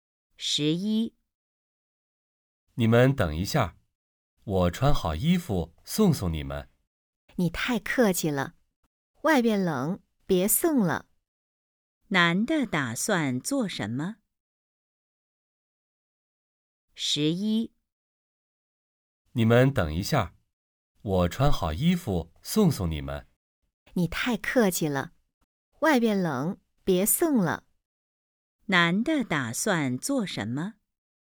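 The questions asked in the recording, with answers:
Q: 男的打算做什么?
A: 送他们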